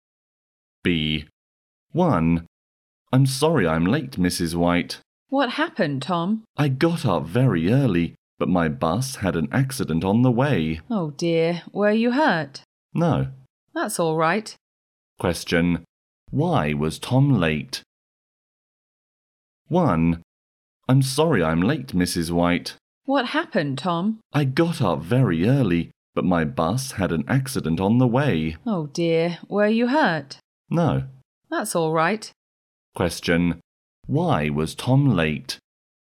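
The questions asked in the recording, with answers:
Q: Why was Tom late?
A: His bus had an accident on the way.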